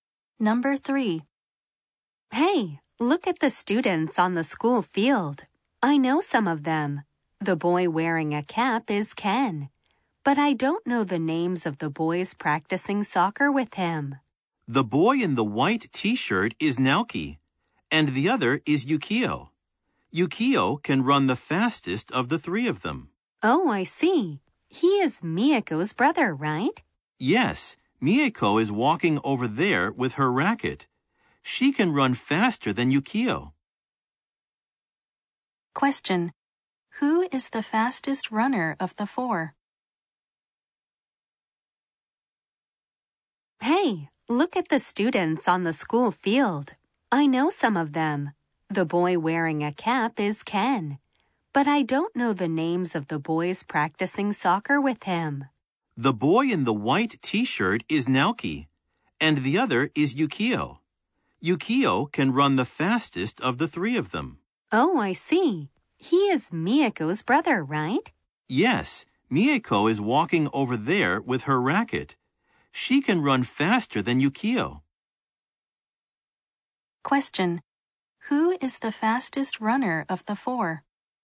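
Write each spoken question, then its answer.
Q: Who is the fastest runner of the 4?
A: Miyako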